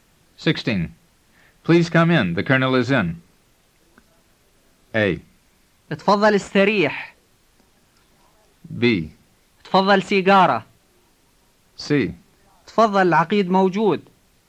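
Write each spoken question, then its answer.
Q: Please come in. The Colonel is in.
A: C: تفضل العقيد موجود.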